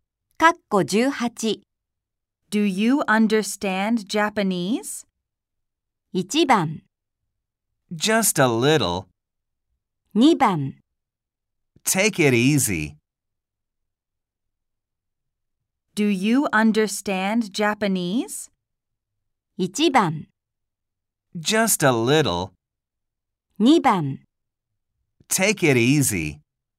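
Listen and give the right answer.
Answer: 1: Just a little.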